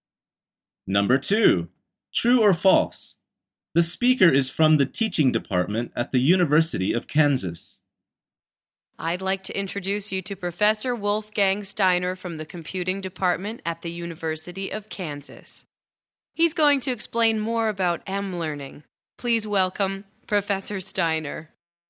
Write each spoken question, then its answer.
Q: True or false? The speaker is from the teaching department at the University of Kansas.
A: The answer is false.